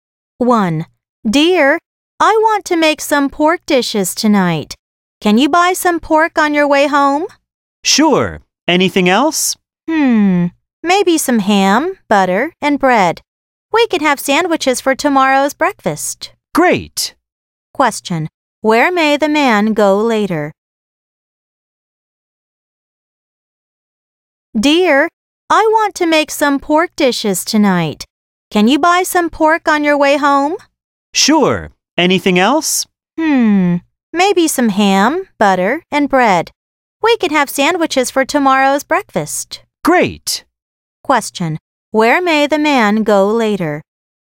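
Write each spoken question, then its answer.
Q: Question. Where may the man go later?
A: To a store or supermarket to buy pork, ham, butter and bread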